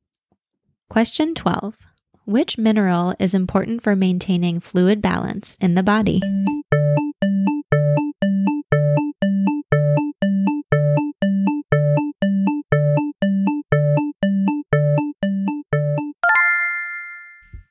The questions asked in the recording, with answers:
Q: Which mineral is important for maintaining fluid balance in the body?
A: Sodium.